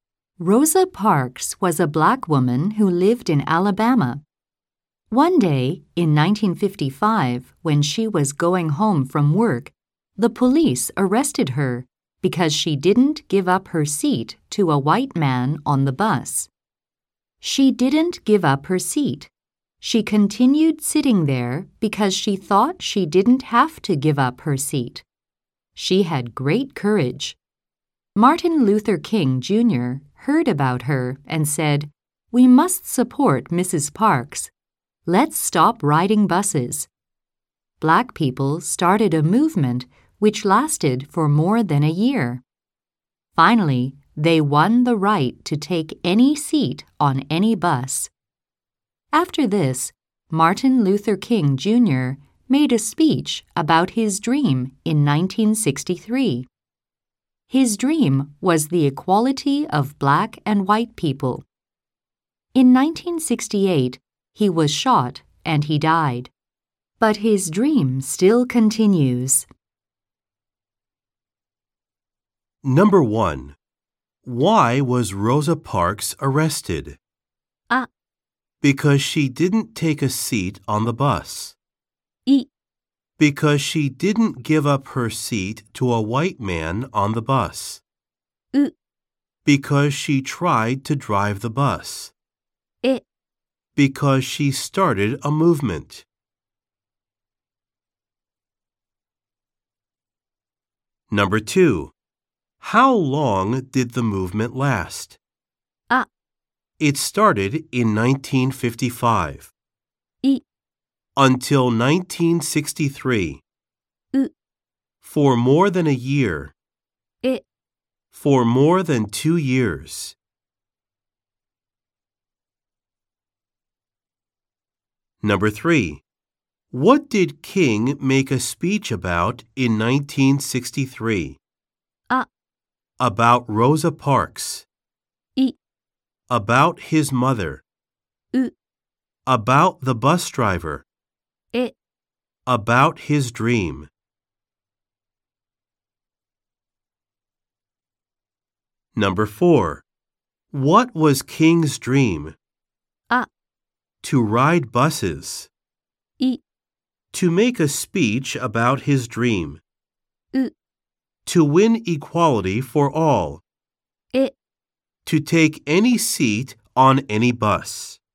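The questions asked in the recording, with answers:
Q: Why was Rosa Parks arrested?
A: い: Because she didn't give up her seat to a white man on the bus.

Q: How long did the movement last?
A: う: For more than a year.

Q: What did King make a speech about in 1963?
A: え: About his dream.

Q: What was King's dream?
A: う: To win equality for all.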